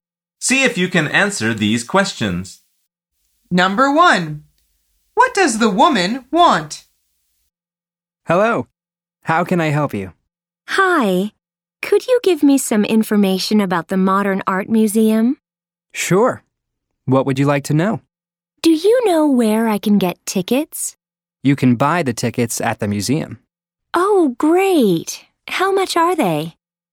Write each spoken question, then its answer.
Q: what does the woman want?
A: The answer is she wants to buy tickets to the museum.